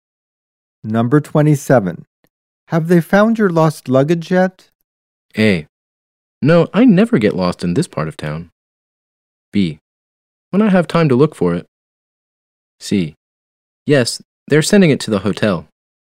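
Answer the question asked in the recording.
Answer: C: Yes, they're sending it to the hotel.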